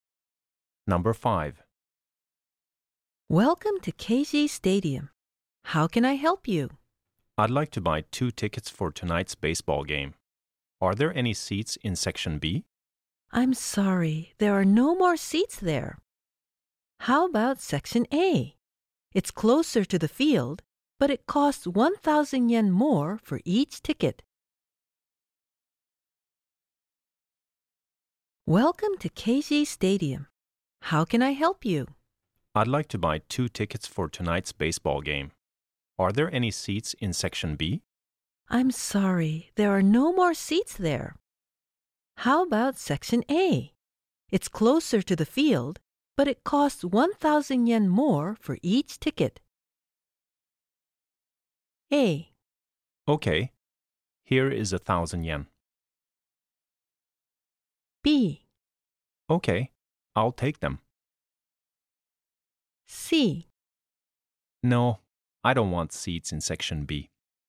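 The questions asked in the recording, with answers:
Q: How about Section A? It's closer to the field, but it costs 1,000 yen more for each ticket.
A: B: Okay, I'll take them.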